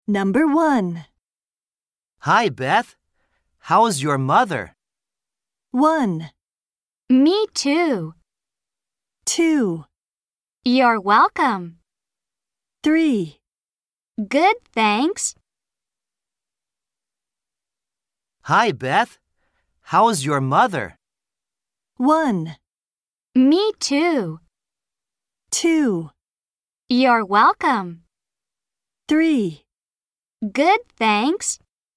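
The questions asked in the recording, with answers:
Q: Hi, Beth. How's your mother?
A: 3: Good, thanks.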